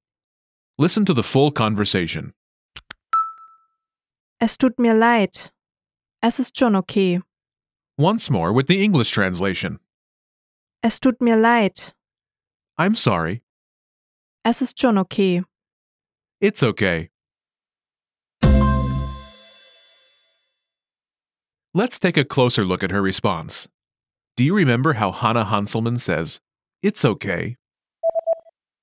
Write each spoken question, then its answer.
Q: Do you remember how Hannah Hanselmann says, "It's okay"?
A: Es ist schon okay.